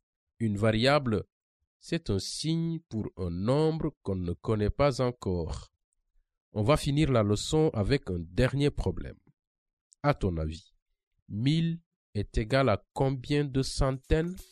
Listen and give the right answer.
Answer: Je pense qu'il y a 10 centaines dans 1000.